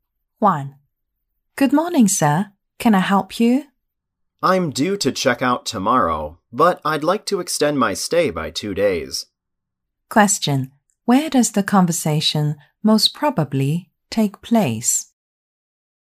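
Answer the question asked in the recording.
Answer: In a hotel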